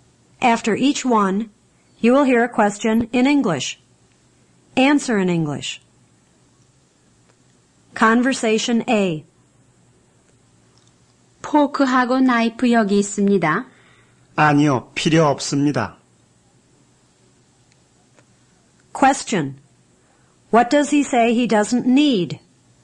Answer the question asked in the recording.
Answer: He doesn't need a fork and a knife.